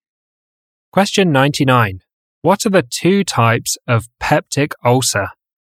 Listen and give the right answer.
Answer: Gastric and duodenal.